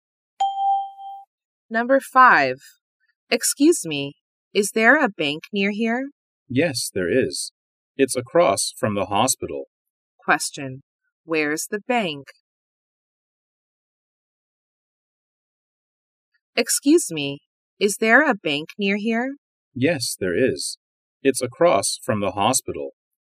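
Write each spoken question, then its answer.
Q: Where's the bank?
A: Across from the hospital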